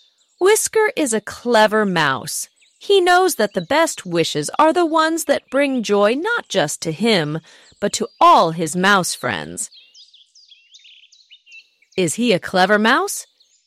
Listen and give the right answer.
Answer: Yes, he is.